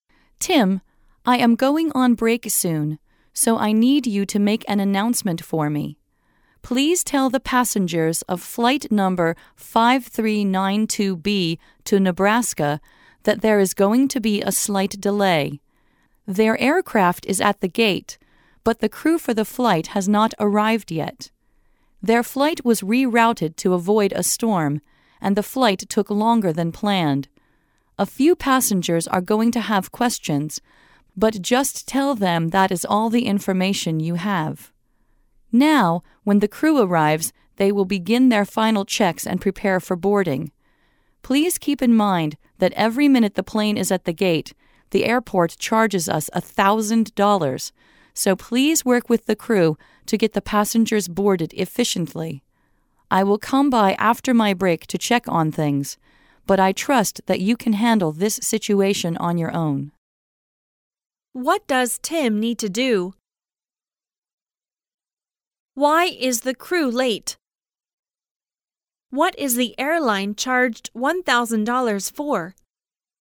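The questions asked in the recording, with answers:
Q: What does Tim need to do?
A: Make an announcement to the passengers of flight 5392B about a slight delay

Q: Why is the crew late?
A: Their flight was rerouted to avoid a storm and took longer than planned

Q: What is the airline charged $1,000 for?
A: Every minute the plane is at the gate

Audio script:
[听力原文] W: Tim, I am going on break soon, so I need you to make an announcement for me. Please tell the passengers of flight number 5392B to Nebraska that there is going to be a slight delay. Their aircraft is at the gate, but the crew for the flight has not arrived yet. Their flight was rerouted to avoid a storm, and the flight took longer than planned. A few passengers are going to have questions, but just tell them that is all the information you have. Now, when the crew arrives, they will begin their final checks and prepare for boarding. 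Please keep in mind that every minute the plane is at the gate, the airport charges us a thousand dollars, so please work with the crew to get the passengers boarded efficiently. I will come by after my break to check on things, but I trust that you can handle this situation on your own.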